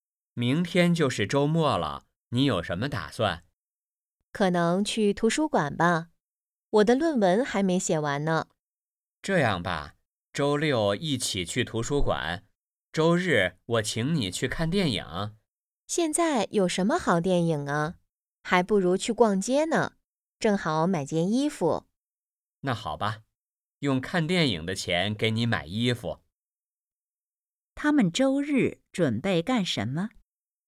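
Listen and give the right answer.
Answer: 去逛街(买衣服)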